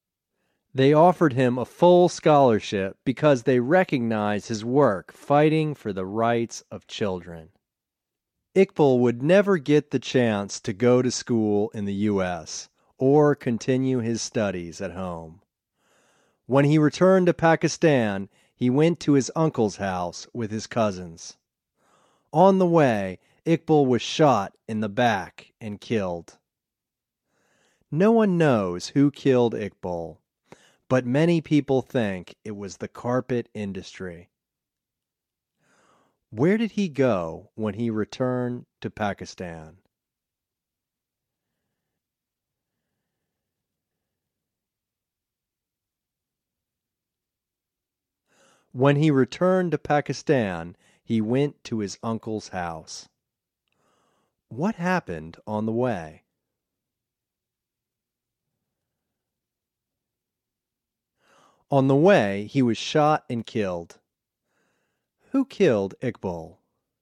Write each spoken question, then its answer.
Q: Where did he go when he returned to Pakistan?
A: When he returned to Pakistan, he went to his uncle's house.

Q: Who killed Iqbal?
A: No one knows who killed Iqbal.